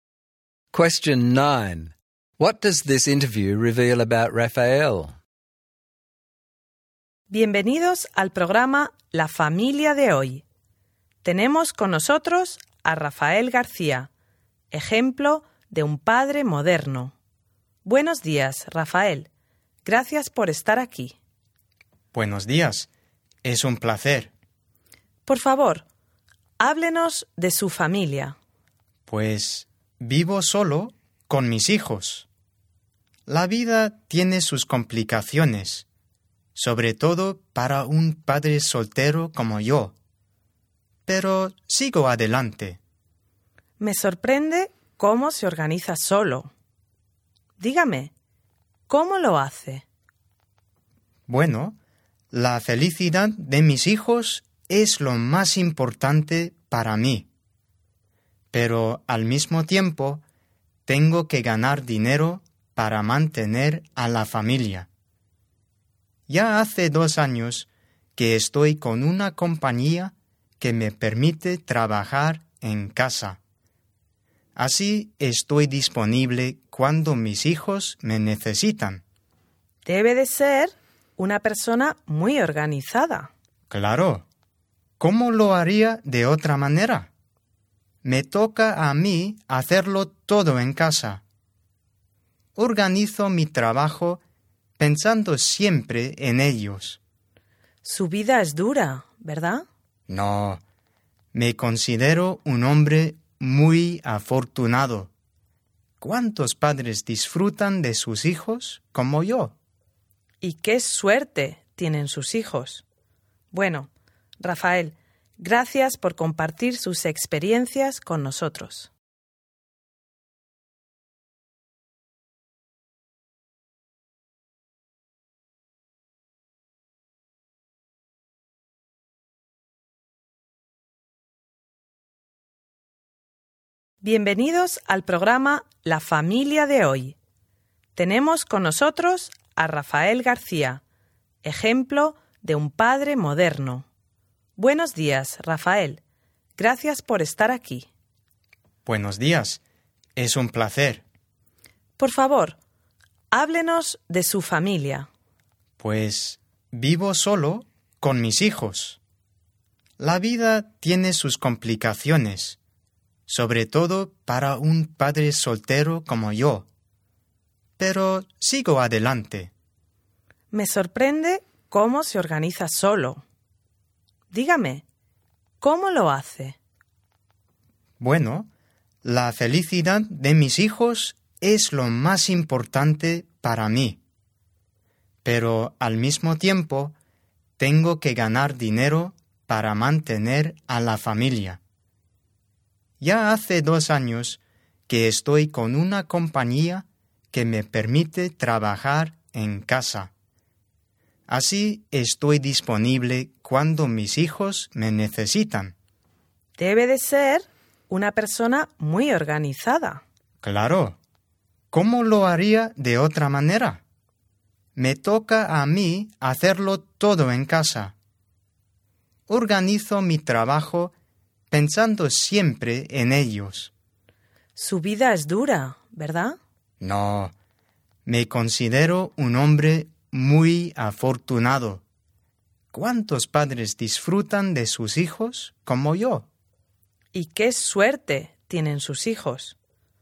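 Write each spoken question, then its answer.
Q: What does this interview reveal about Rafael?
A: He is a well-organized single father who works from home so he can be there for his children, and he feels very lucky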